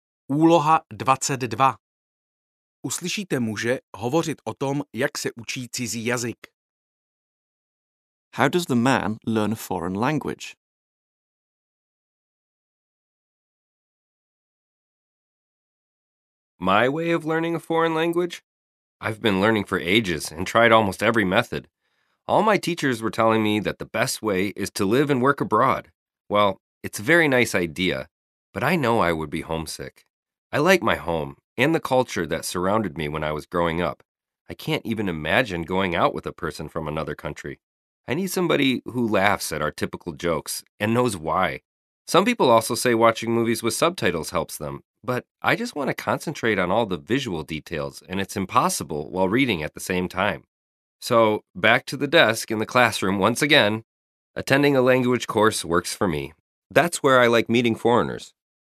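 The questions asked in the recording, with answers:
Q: How does the man learn a foreign language?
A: He attends a language course.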